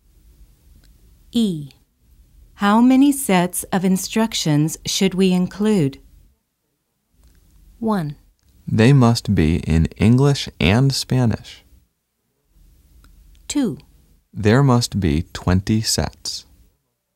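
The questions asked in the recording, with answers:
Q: How many sets of instructions should we include?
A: 2: There must be 20 sets.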